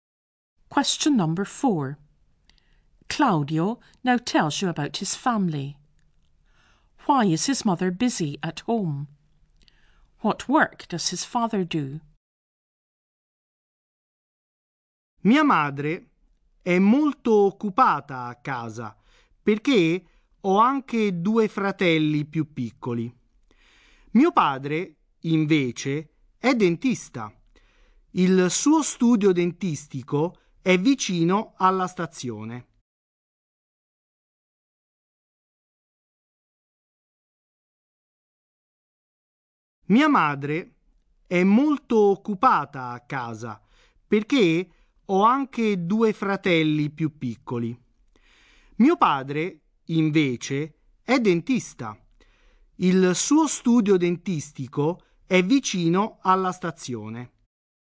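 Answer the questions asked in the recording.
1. He has two younger brothers
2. He is a dentist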